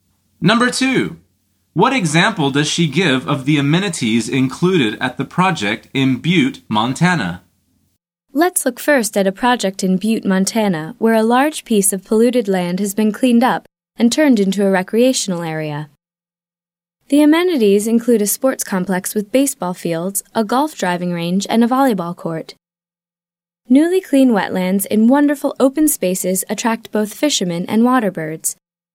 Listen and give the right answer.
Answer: The answer is a sports complex.